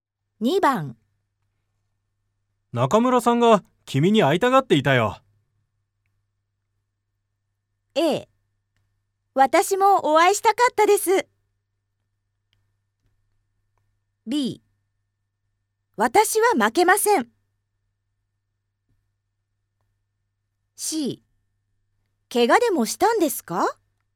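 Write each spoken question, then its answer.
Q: 中村さんが君に会いたがっていたよ。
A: A: 私もお会いしたかったです。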